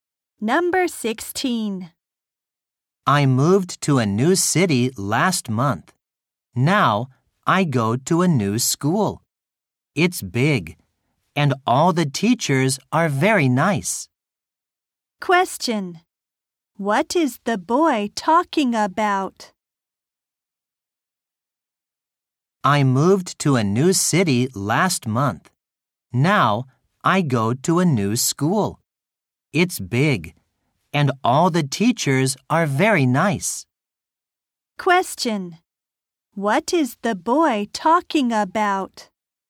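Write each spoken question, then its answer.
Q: What is the boy talking about?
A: His new school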